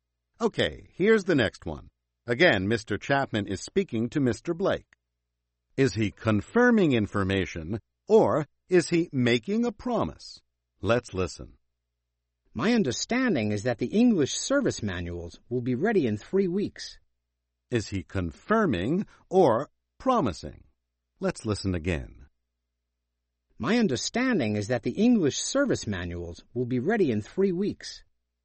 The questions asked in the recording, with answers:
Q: Is he confirming information, or is he making a promise?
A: He's confirming his understanding.